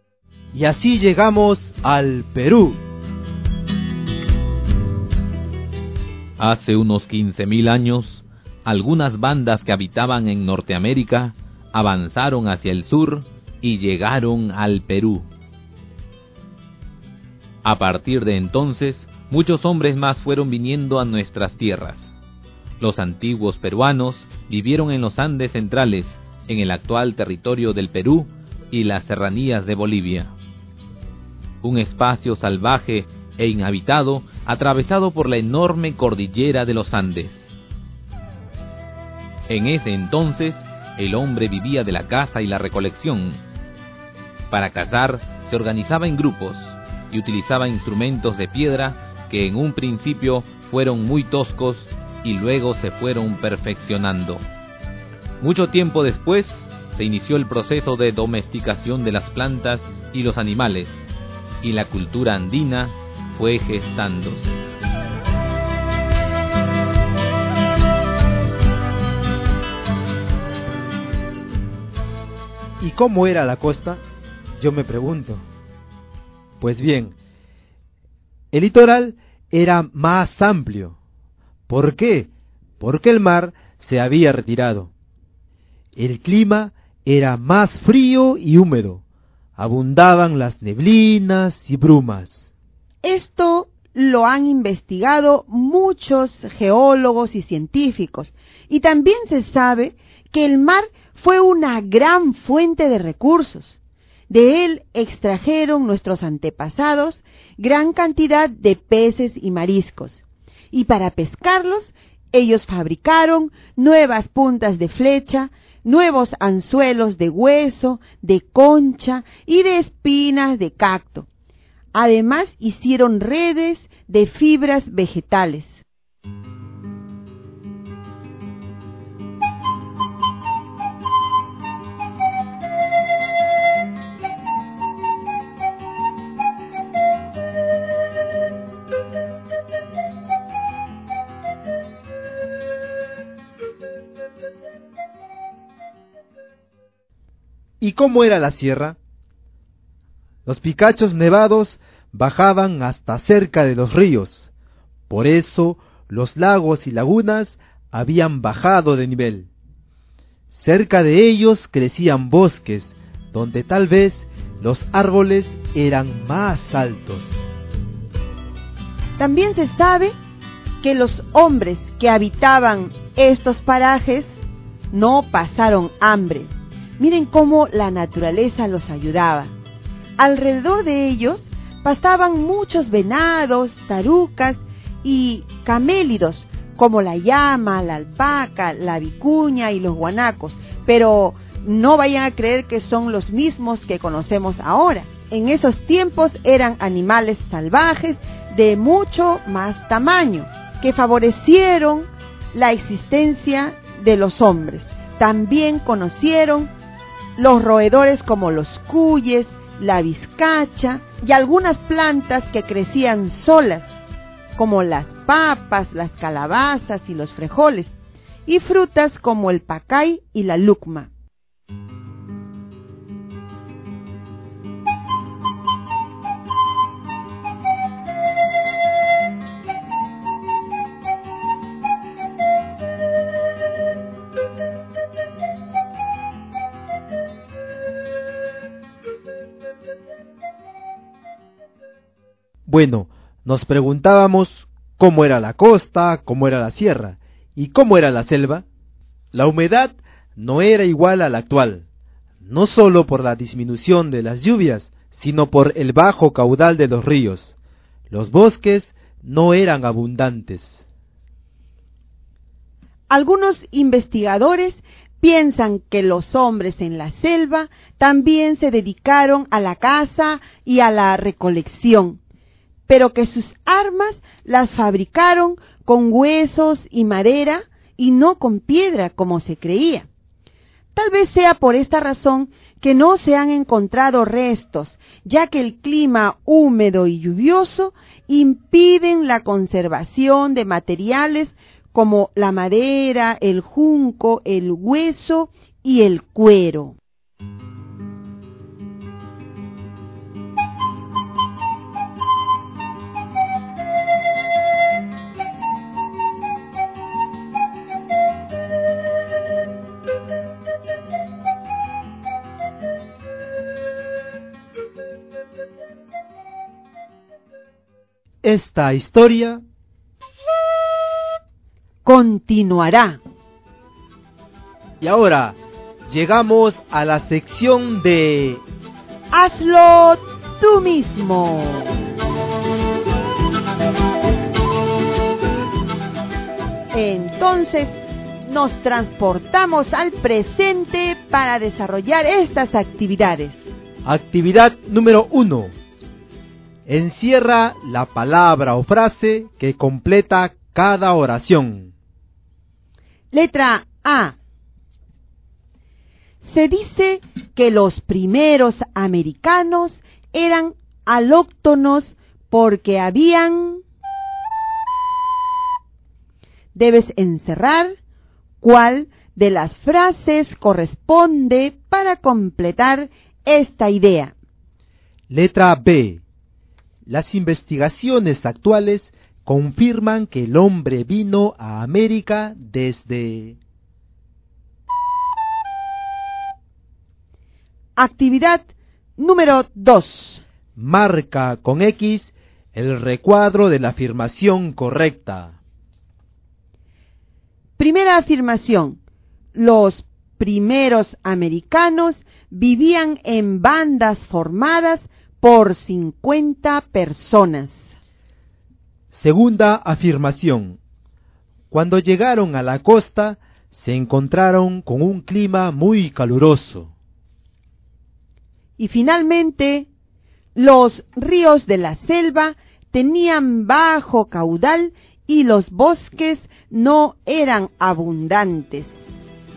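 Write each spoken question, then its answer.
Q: Segunda afirmación. Cuando llegaron a la costa, se encontraron con un clima muy caluroso.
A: Falso: el clima era más frío y húmedo

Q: Y finalmente, los ríos de la selva tenían bajo caudal y los bosques no eran abundantes.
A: Verdadero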